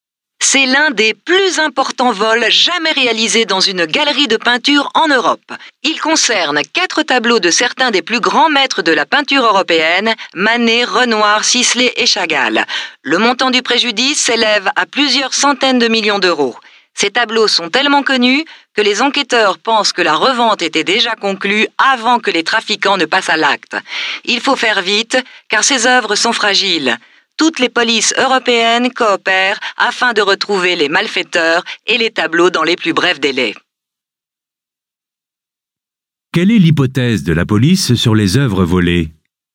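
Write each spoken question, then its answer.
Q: Quelle est l'hypothèse de la police sur les œuvres volées?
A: Elles étaient déjà revendues avant le vol.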